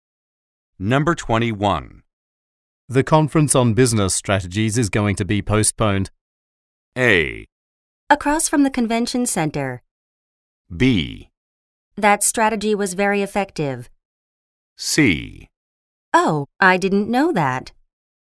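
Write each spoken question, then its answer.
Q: The conference on business strategies is going to be postponed.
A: C: Oh, I didn't know that.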